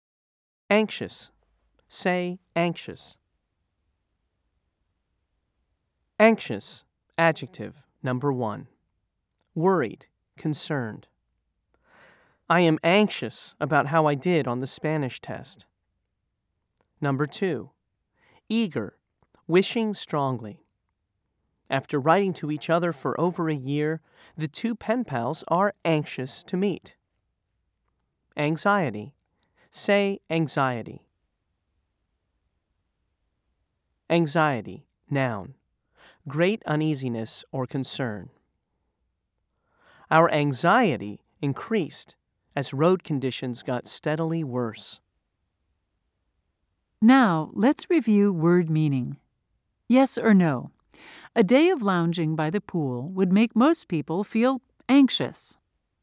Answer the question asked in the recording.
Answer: If you said no, you were right.